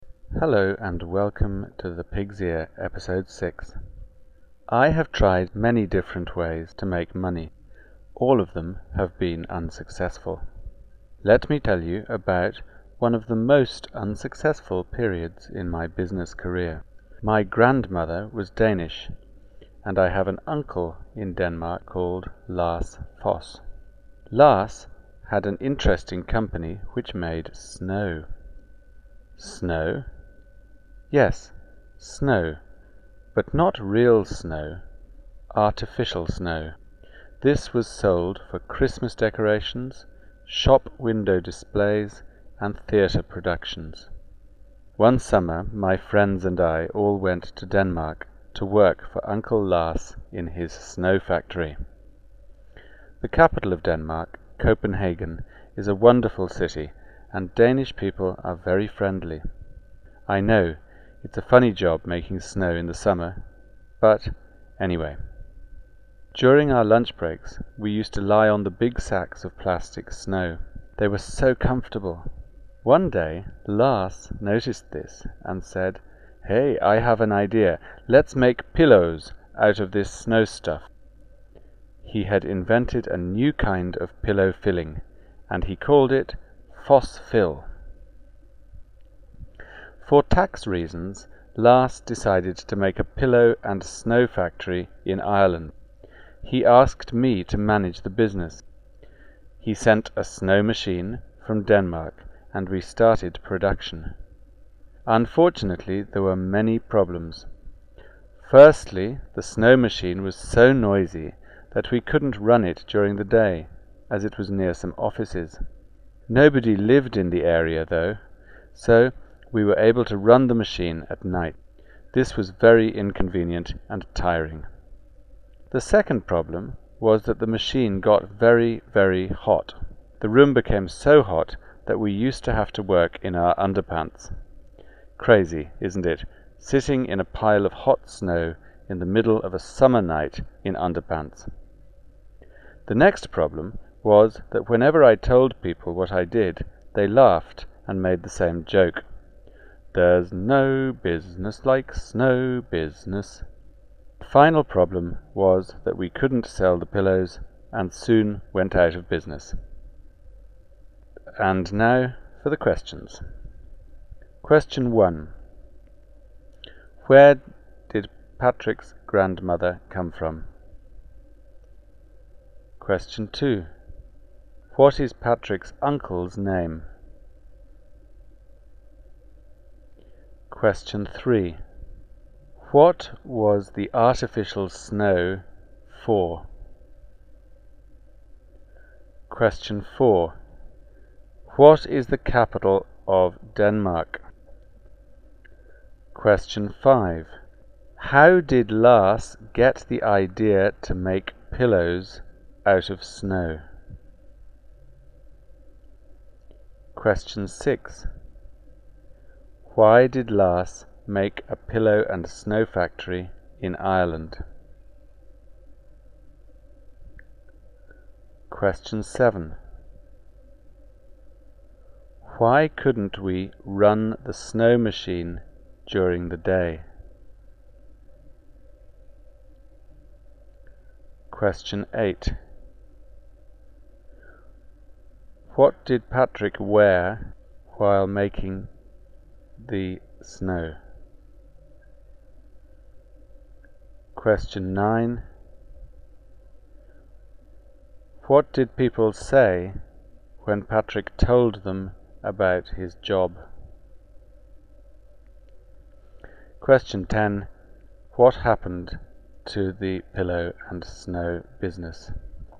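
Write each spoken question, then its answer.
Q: Where did Patrick's grandmother come from?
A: Denmark

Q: What is Patrick's uncle's name?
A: Lars Foss

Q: What was the artificial snow for?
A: Christmas decorations, shop window displays and theatre productions

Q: What is the capital of Denmark?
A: Copenhagen

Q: How did Lars get the idea to make pillows out of snow?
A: He saw the workers lying on the sacks of plastic snow at lunch

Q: Why did Lars make a pillow and snow factory in Ireland?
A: For tax reasons

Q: Why couldn't we run the snow machine during the day?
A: It was too noisy and near some offices

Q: What did Patrick wear while making the snow?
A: His underpants

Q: What did people say when Patrick told them about his job?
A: There's no business like snow business

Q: What happened to the pillow and snow business?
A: They couldn't sell the pillows and it went out of business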